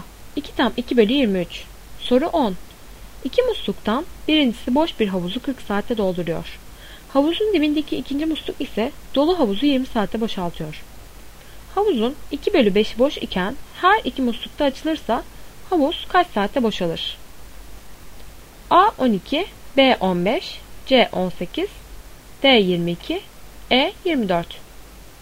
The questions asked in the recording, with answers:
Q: Havuzun 2 bölü 5'i boş iken her iki muslukta açılırsa havuz kaç saatte boşalır?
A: Doğru cevap E 24.